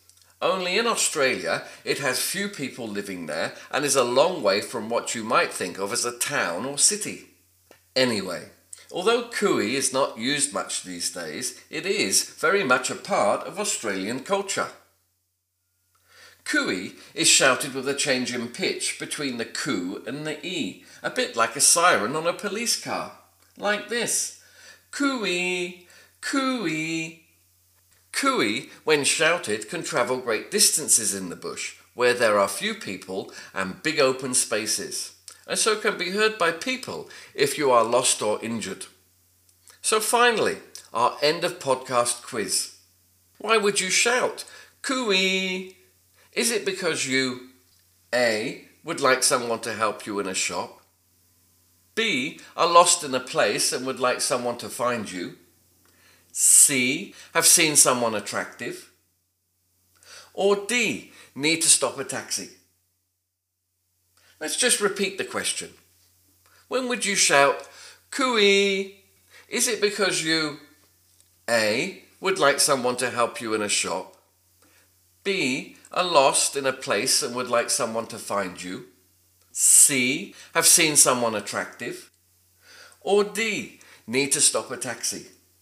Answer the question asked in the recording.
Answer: did you get B, are lost in a place and would like someone to find you?